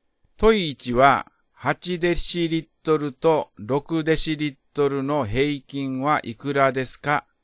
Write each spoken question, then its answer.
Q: 問い1は、8デシリットルと6デシリットルの平均はいくらですか?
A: 答えは7デシリットルです。